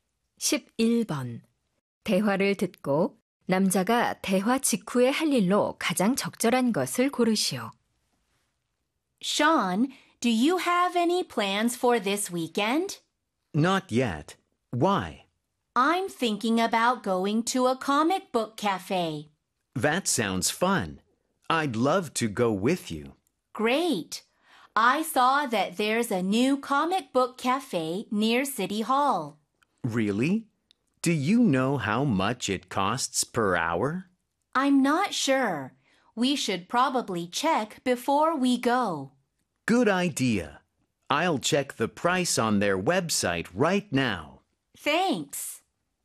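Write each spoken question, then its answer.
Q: 대화를 듣고 남자가 대화 직후에 할 일로 가장 적절한 것을 고르시오.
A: 웹사이트에서 만화 카페 가격 확인하기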